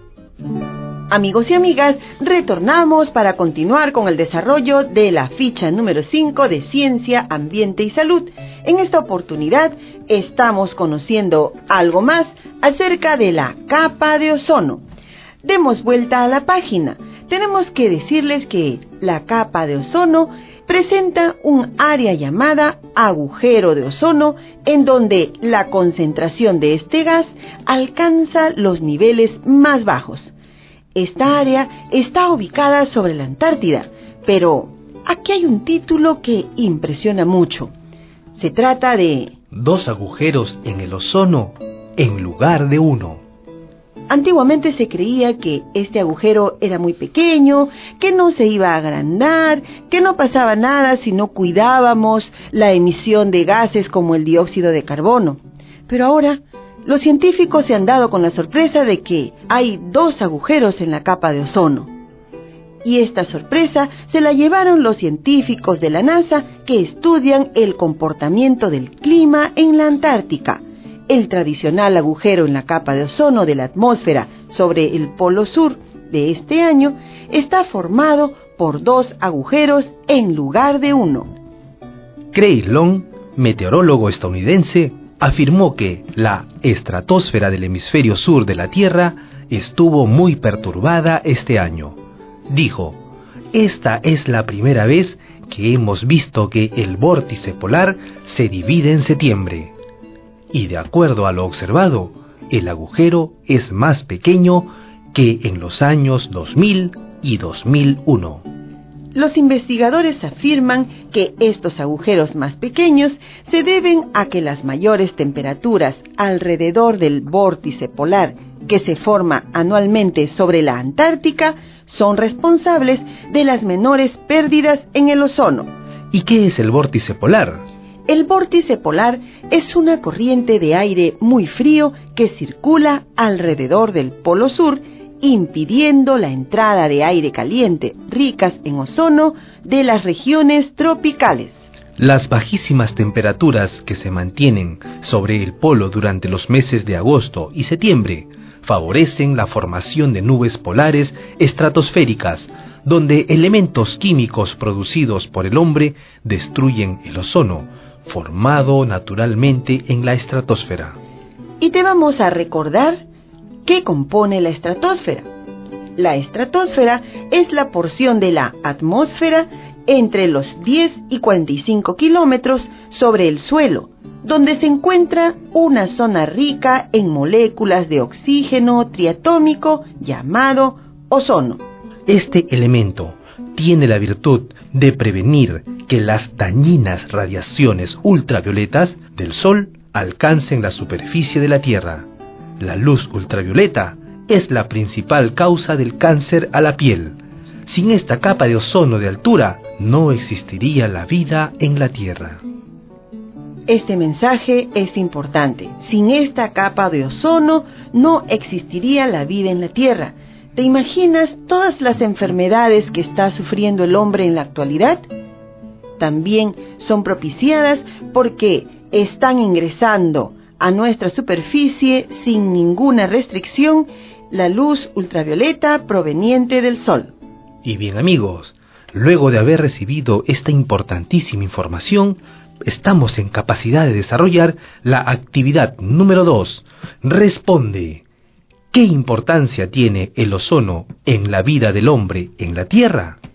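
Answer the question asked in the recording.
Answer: Forma un escudo que impide que las dañinas radiaciones ultravioleta del Sol, que causan cáncer a la piel, lleguen a la superficie; sin la capa de ozono no existiría la vida en la Tierra.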